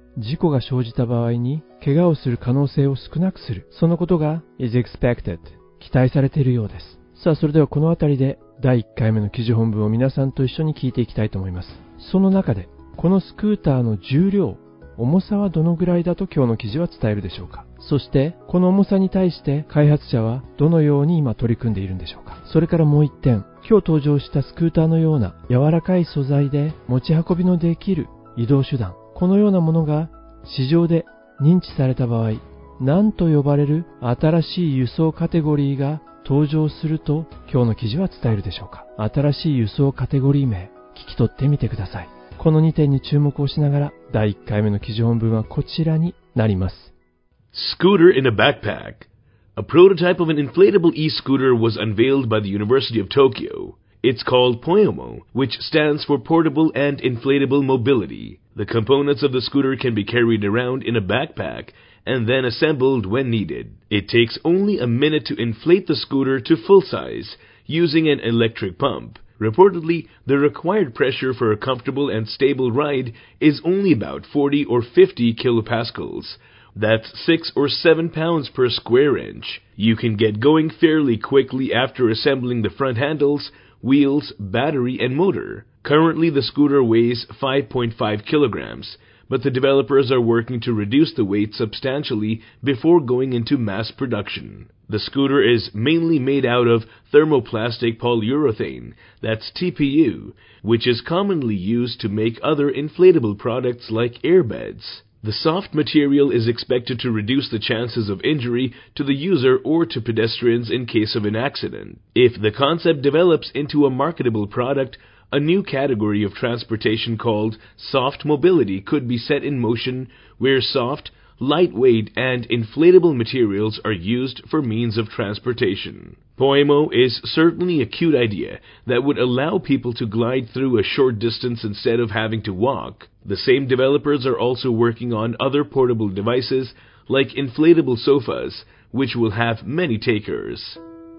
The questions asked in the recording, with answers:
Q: その中でこのスクーターの重量、重さはどのぐらいだと今日の記事は伝えるでしょうか。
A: 5.5 kilogram の重さなんですね。

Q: そしてこの重さに対して開発者はどのように今取り組んでいるんでしょうか。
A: Mass production 大量生産に入る前に、現在 5.5 キロの重さのスクーターをもっともっと軽くしようとデベロッパーの人たちは取り組んでいるようです。

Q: それからもう一点、今日登場したスクーターのような柔らかい素材で持ち運びのできる移動手段、このようなものが市場で認知された場合、何と呼ばれる新しい輸送カテゴリーが登場すると今日の記事は伝えるでしょうか。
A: ソフトモビリティと呼ばれる新しい輸送カテゴリー、このカテゴリーが